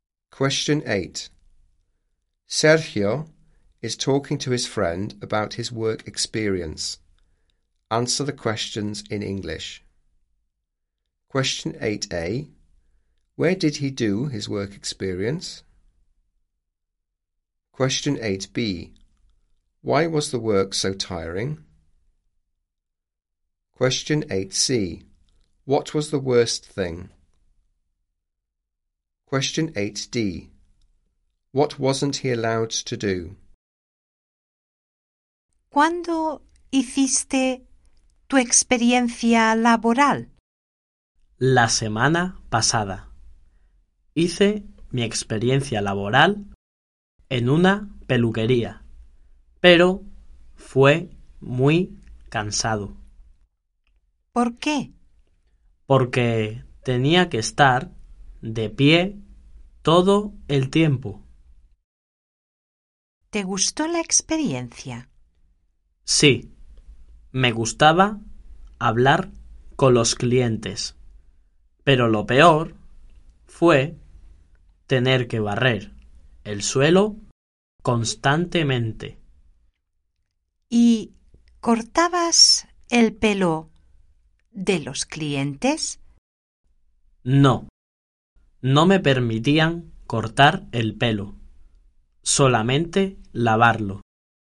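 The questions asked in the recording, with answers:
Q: Where did he do his work experience?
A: At a hairdresser's

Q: Why was the work so tiring?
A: He had to stand up all the time

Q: What was the worst thing?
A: Sweeping the floor all the time

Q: What wasn't he allowed to do?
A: Cut the customers' hair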